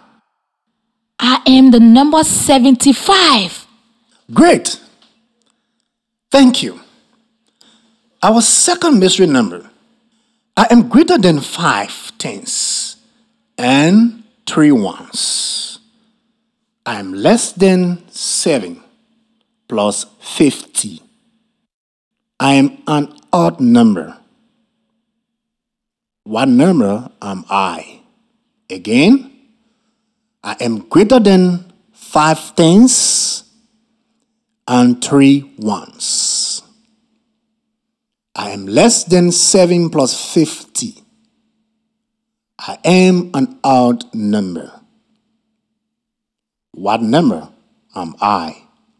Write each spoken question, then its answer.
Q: I am an odd number. What number am I?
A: 55.